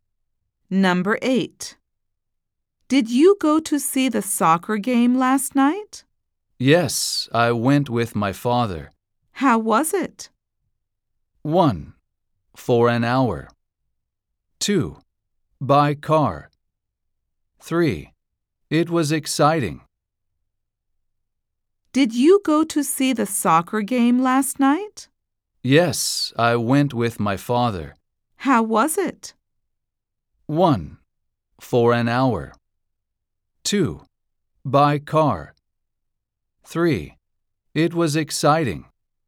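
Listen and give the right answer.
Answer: 3: It was exciting.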